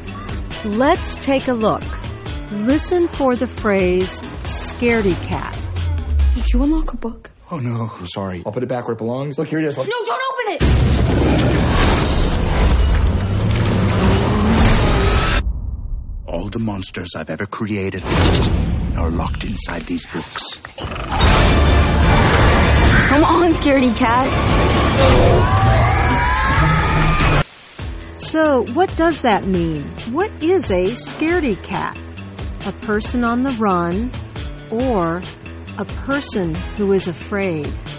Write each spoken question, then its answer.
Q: What is a scaredy cat?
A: A scaredy cat is a person who is very afraid.